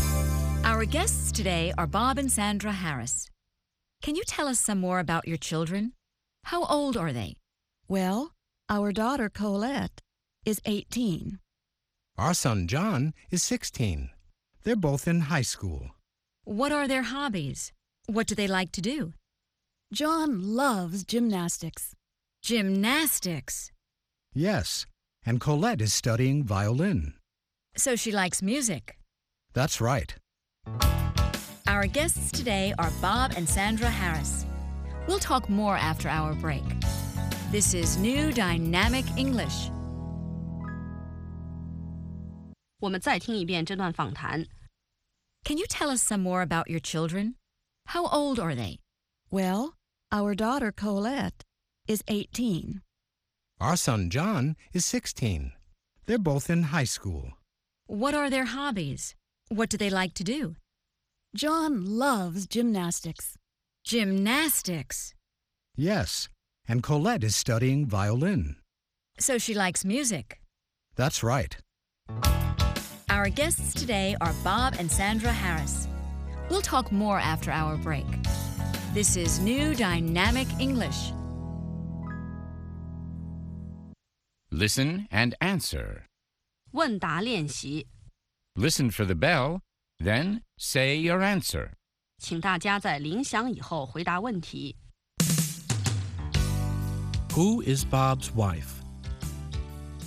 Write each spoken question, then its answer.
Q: Who is Bob's wife?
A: Sandra is Bob's wife.